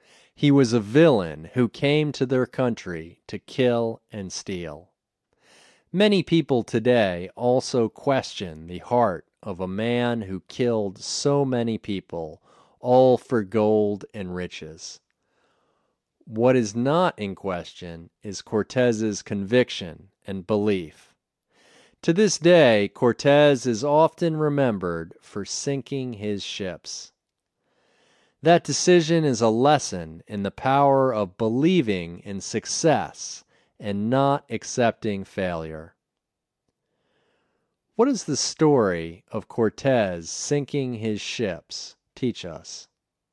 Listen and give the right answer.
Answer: The story of Cortez sinking his ships teaches us the power of believing in success and not accepting failure.